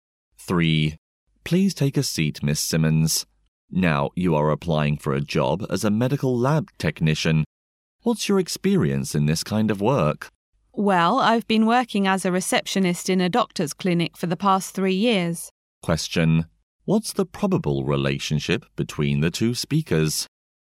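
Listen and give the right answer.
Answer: Interviewer and job applicant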